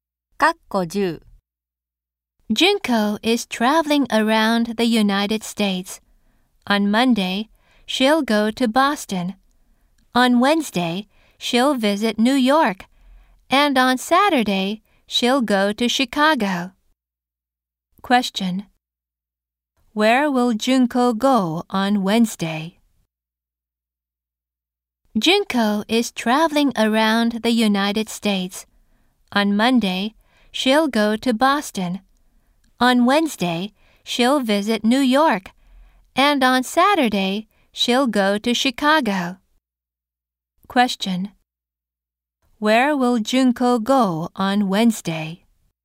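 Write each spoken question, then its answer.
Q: Where will Junko go on Wednesday?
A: New York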